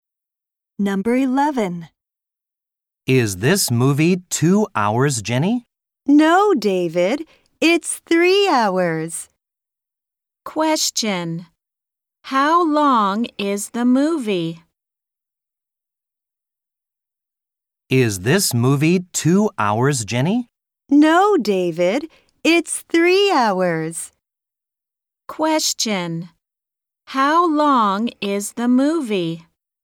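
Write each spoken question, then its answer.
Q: How long is the movie?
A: 3 hours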